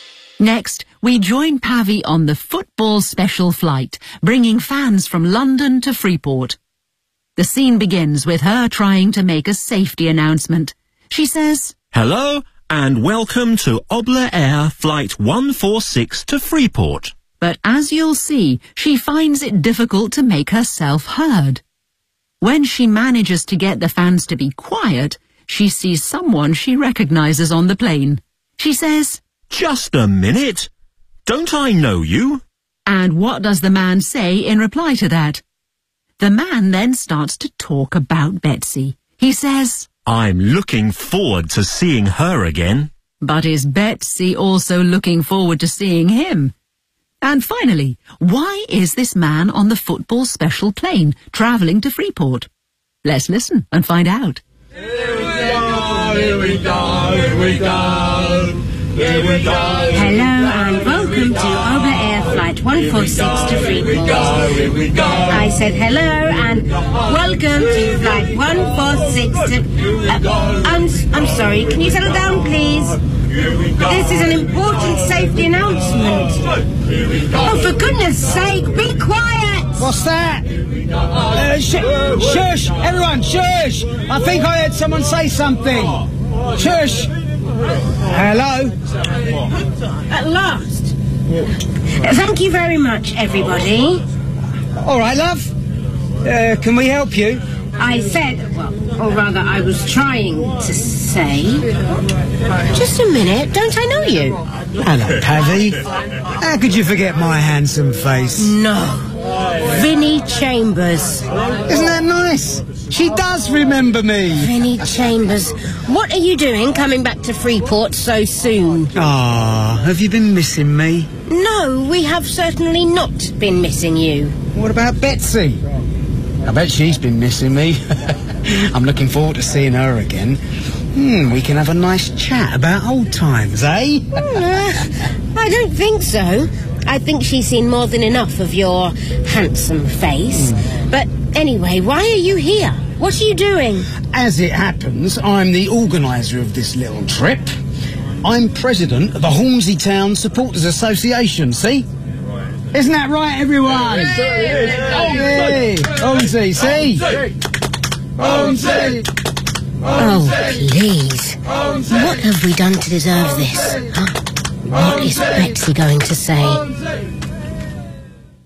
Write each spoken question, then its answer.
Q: And what does the man say in reply to that?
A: How could you forget my handsome face?

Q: But is Betsy also looking forward to seeing him?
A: No.

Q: And finally, why is this man on the football special plane travelling to Freeport?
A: Because he's the president of the Hornsey Town Supporters Association.